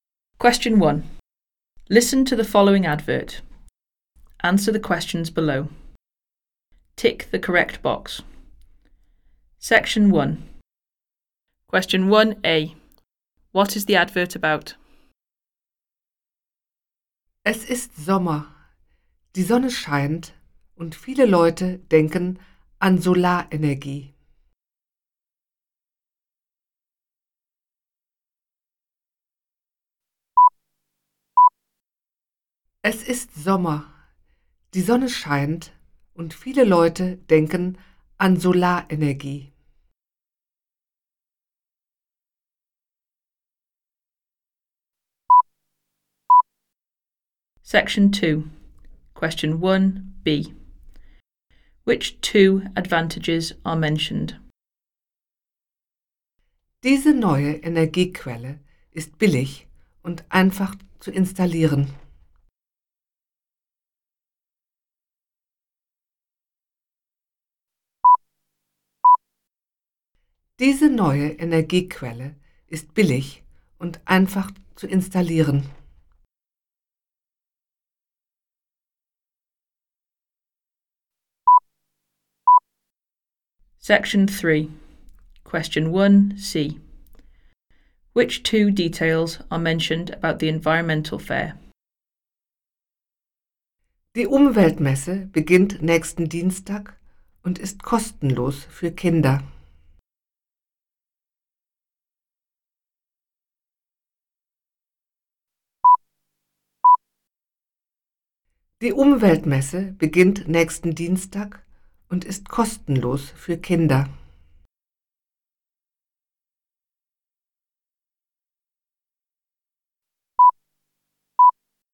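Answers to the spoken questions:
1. Solar energy
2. It is cheap and easy to install
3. It starts next Tuesday and is free for children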